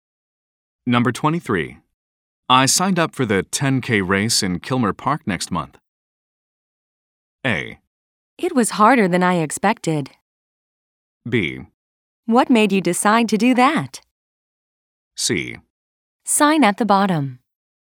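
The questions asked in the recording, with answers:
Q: I signed up for the 10K race in Kilmer Park next month.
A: B: What made you decide to do that?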